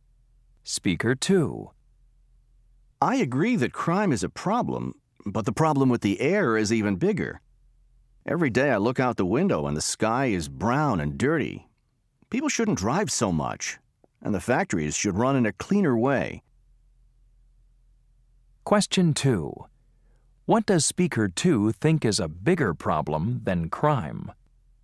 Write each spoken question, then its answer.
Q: What does Speaker 2 think is a bigger problem than crime?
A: Air pollution here is really bad.